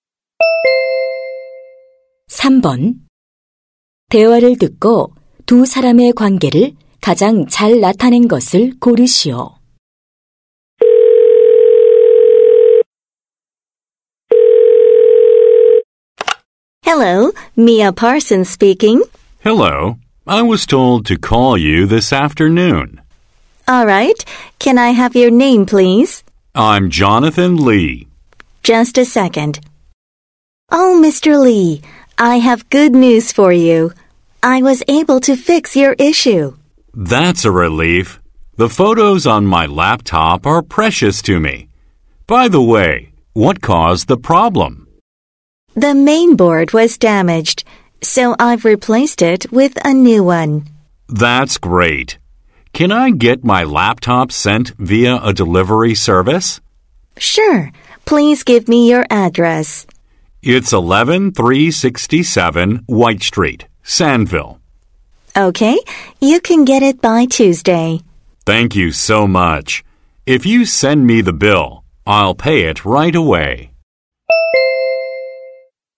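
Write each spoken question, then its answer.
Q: 대화를 듣고 두 사람의 관계를 가장 잘 나타낸 것을 고르시오.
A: 노트북 수리 기사 - 고객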